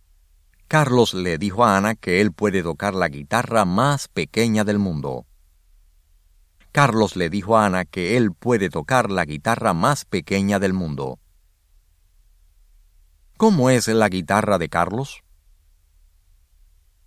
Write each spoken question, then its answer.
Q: ¿Cómo es la guitarra de Carlos?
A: Es la guitarra más pequeña del mundo.